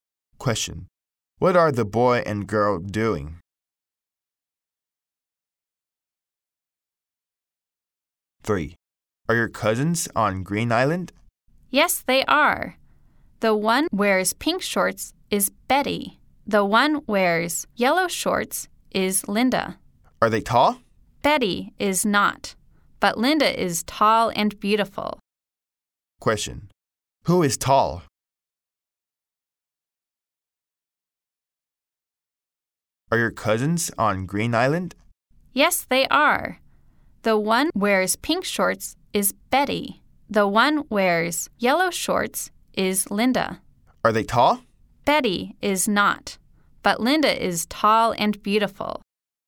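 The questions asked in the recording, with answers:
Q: Who is tall?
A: Linda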